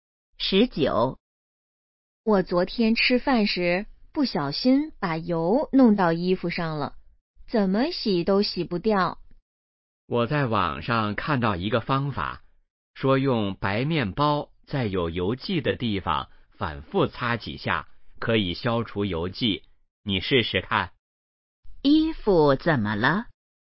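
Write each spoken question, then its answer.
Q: 衣服怎么了?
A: 沾上了油迹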